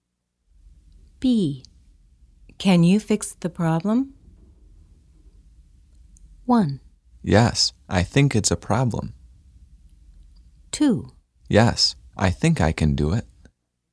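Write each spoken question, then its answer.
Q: Can you fix the problem?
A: 2: Yes, I think I can do it.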